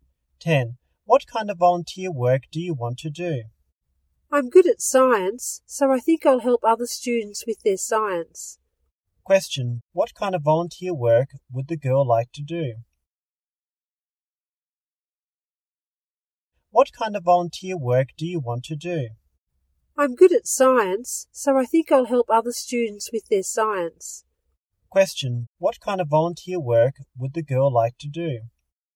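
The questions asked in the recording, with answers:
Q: Question, what kind of volunteer work would the girl like to do?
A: Help other students with their science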